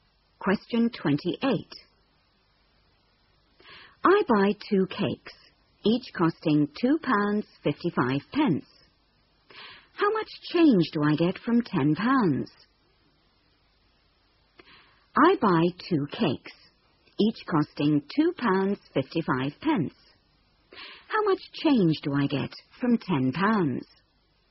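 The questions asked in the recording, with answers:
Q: How much change do I get from £10?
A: £4.90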